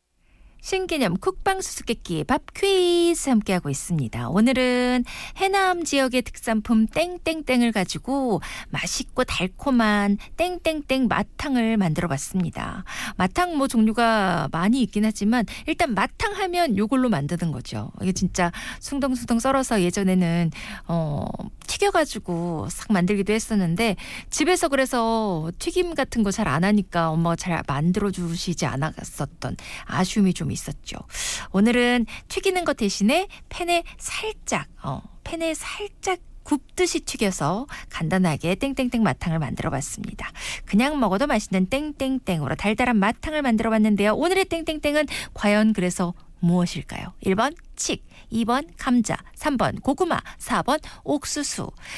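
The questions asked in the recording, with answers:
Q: 오늘의 땡땡땡은 과연 그래서 무엇일까요? 1번 칡, 2번 감자, 3번 고구마, 4번 옥수수.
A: 3번: 고구마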